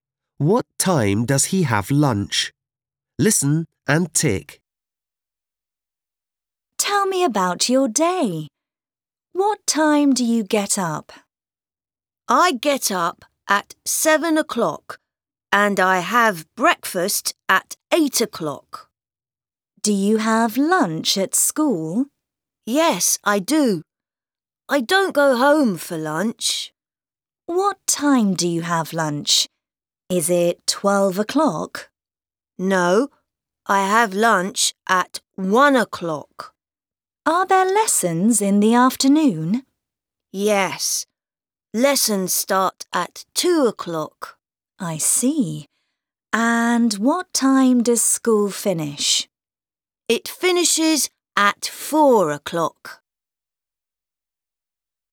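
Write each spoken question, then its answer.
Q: What time does he have lunch?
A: At 1 o'clock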